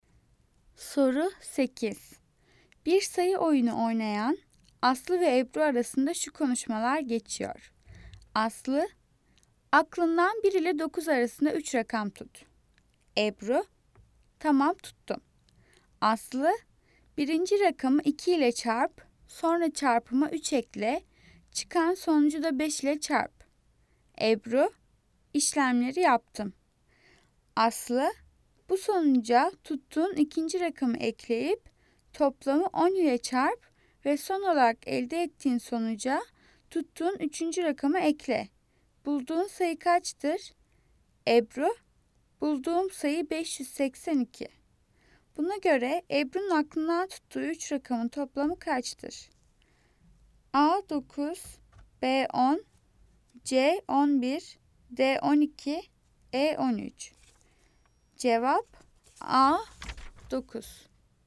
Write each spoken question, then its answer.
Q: Buna göre Ebru'nun aklından tuttuğu üç rakamın toplamı kaçtır?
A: Cevap A 9.